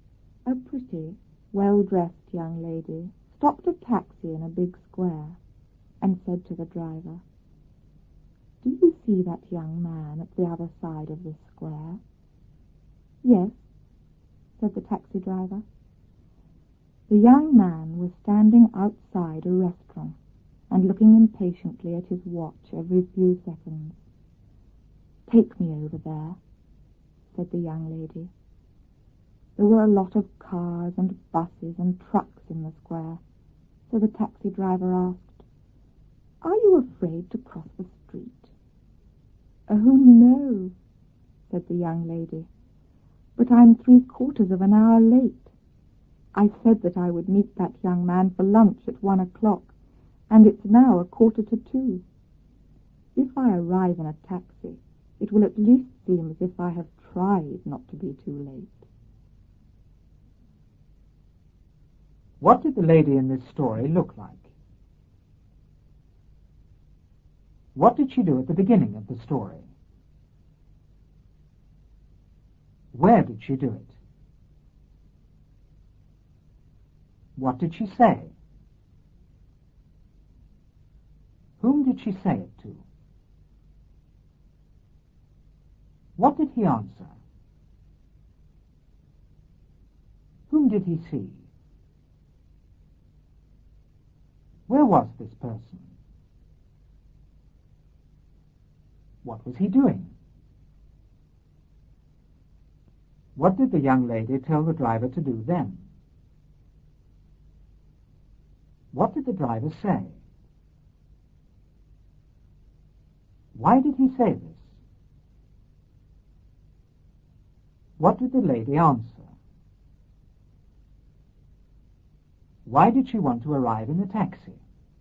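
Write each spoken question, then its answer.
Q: What did the lady in this story look like?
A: She was pretty and well-dressed.

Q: What did she do at the beginning of the story?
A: She stopped a taxi.

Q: Where did she do it?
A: In a big square.

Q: What did she say?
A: "Do you see that young man at the other side of the square?"

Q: Whom did she say it to?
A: To the taxi driver.

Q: What did he answer?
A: "Yes."

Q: Whom did he see?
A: A young man.

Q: Where was this person?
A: Outside a restaurant on the other side of the square.

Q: What was he doing?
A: Looking impatiently at his watch every few seconds.

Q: What did the young lady tell the driver to do then?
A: Take her over there, to the young man.

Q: What did the driver say?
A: "Are you afraid to cross the street?"

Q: Why did he say this?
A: Because there were a lot of cars, buses and trucks in the square.

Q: What did the lady answer?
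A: "Oh, no, but I'm 3/4 of an hour late."

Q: Why did she want to arrive in a taxi?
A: So it would at least seem as if she had tried not to be too late.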